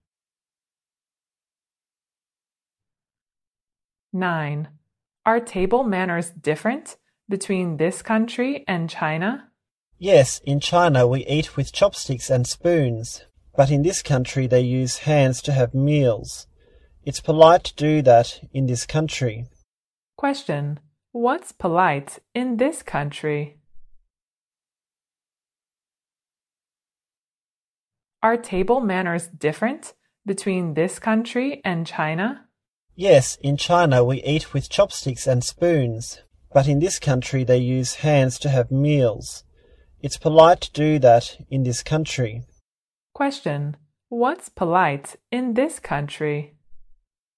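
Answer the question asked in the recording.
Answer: Eating with hands.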